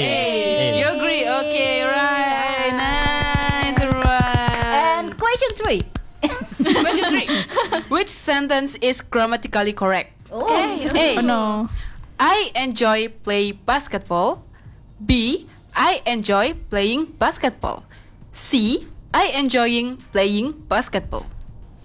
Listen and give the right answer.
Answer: So the correct answer is B.